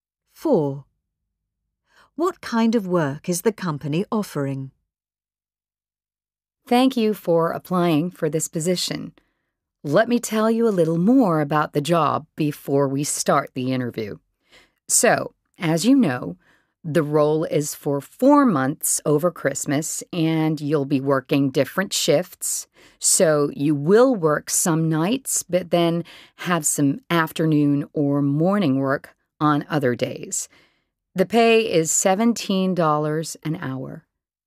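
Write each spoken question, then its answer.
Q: What kind of work is the company offering?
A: Temporary shift work for 4 months over Christmas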